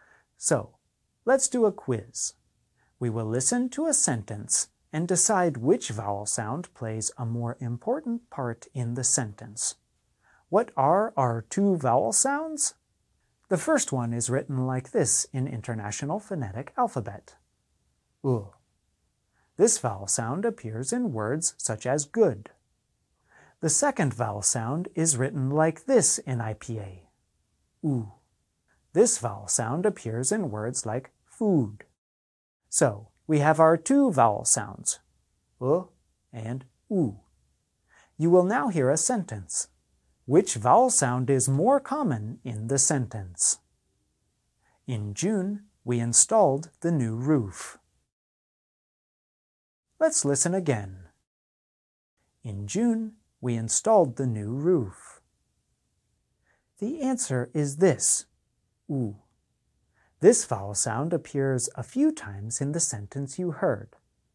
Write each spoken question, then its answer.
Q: Which vowel sound is more common in the sentence?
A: The answer is this, This vowel sound appears many times in the sentence you heard.